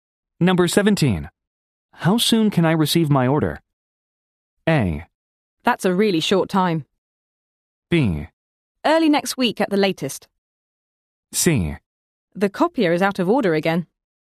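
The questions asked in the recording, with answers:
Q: How soon can I receive my order?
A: B: Early next week at the latest.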